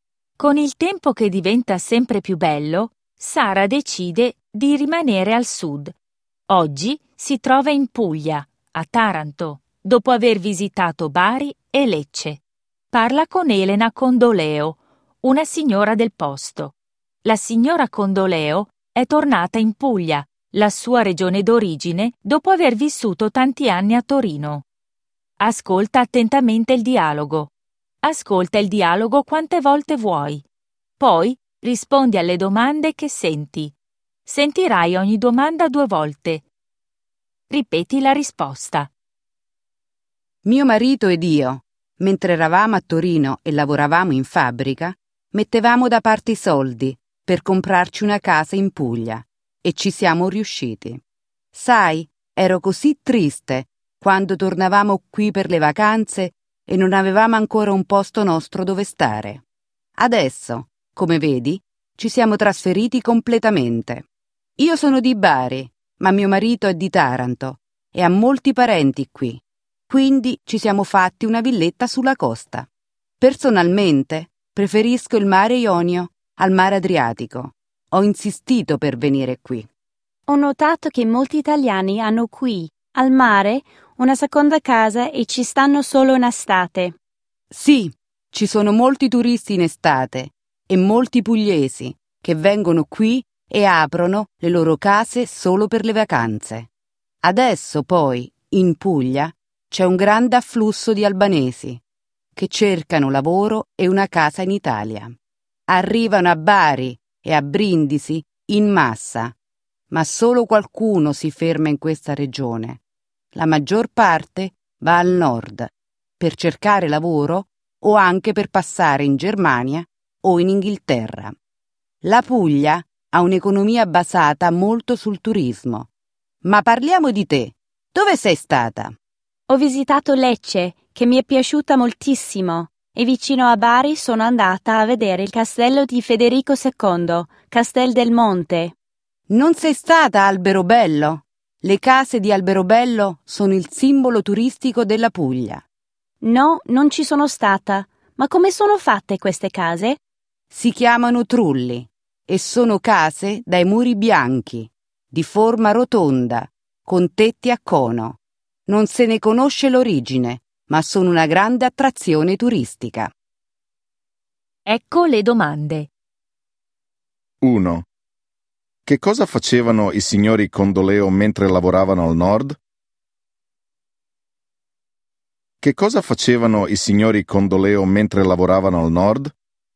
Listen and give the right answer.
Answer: I signori Condoleo mettevano da parte i soldi per comprarsi una casa in Puglia.